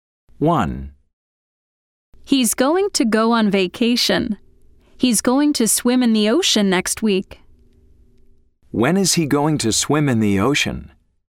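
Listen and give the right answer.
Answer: next week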